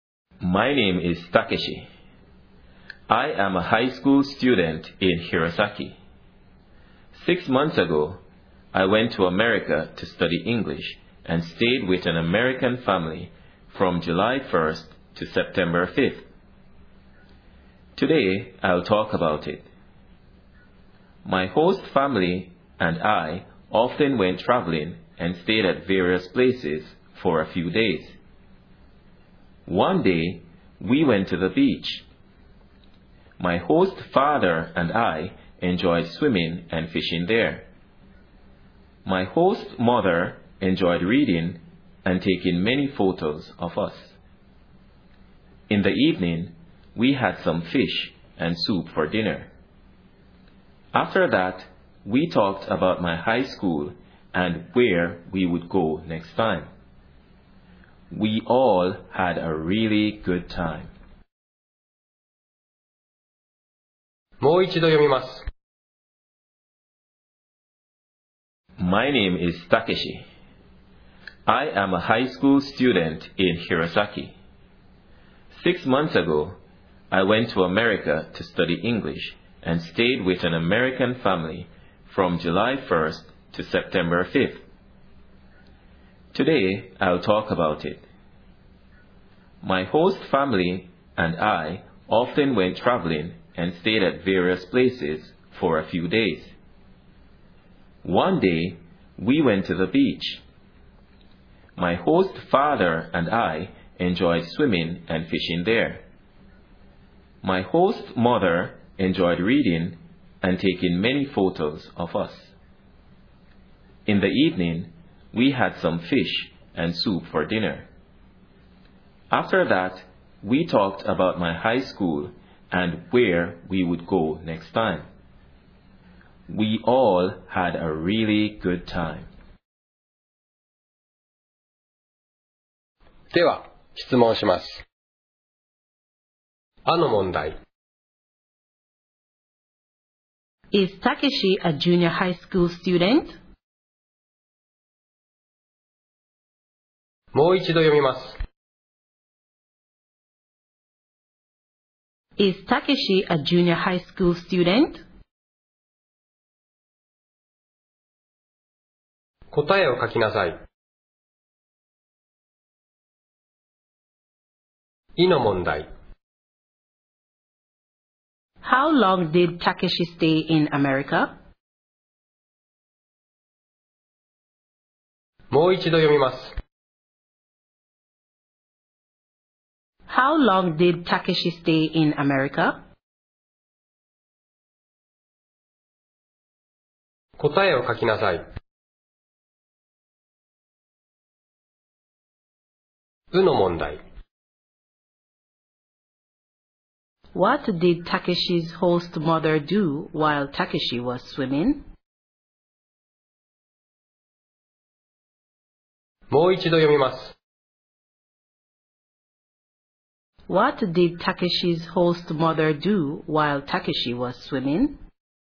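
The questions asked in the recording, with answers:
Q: Is Takeshi a junior high school student?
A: No, he isn't. He is a high school student.

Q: How long did Takeshi stay in America?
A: About two months (July 1st to September 5th)

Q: What did Takeshi's host mother do while Takeshi was swimming?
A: She read and took many photos.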